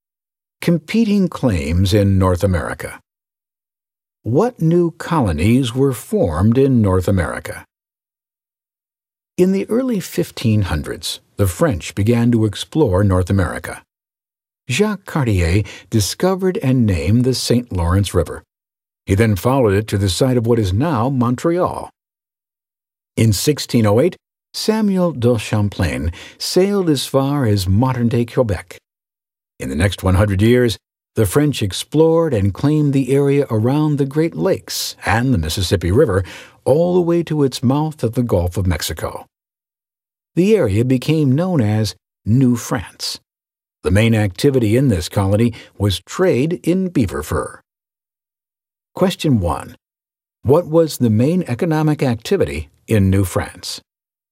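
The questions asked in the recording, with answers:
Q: What was the main economic activity in New France?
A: Trade in beaver fur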